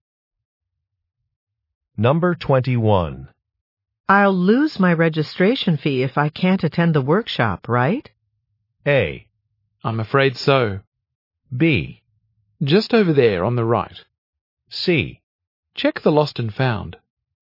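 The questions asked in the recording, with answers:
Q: I'll lose my registration fee if I can't attend the workshop, right?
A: A: I'm afraid so.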